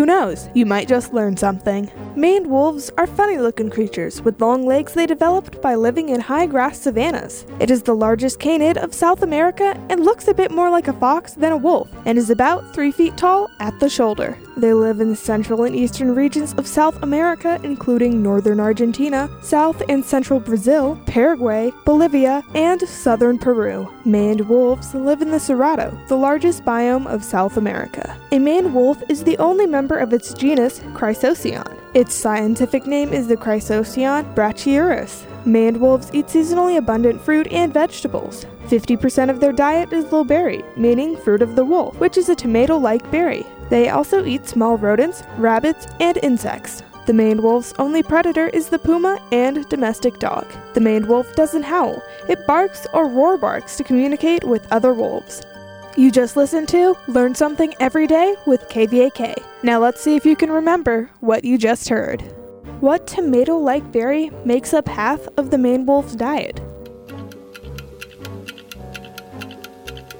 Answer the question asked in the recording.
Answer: The low berry makes up half of the maned wolf's diet.